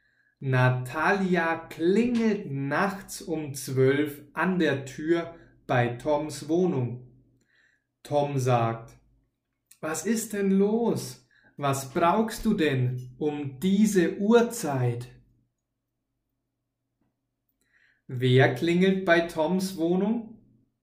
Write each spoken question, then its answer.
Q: Wer klingelt bei Toms Wohnung?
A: Natalia, sie klingelt bei Toms Wohnung.